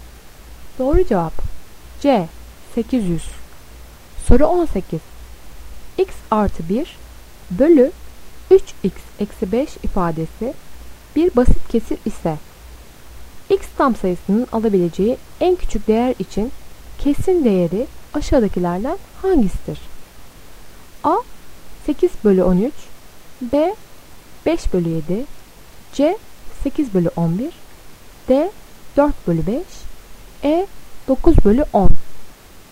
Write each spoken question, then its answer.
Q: X artı 1 bölü 3x eksi 5 ifadesi bir basit kesir ise x tam sayısının alabileceği en küçük değer için kesirin değeri aşağıdakilerden hangisidir?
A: Doğru cevap B 5 bölü 7.